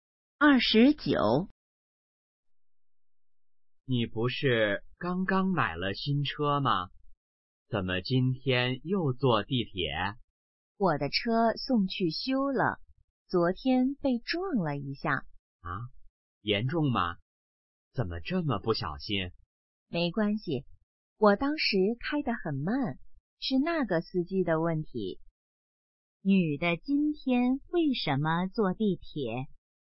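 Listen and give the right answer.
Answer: 车送去修了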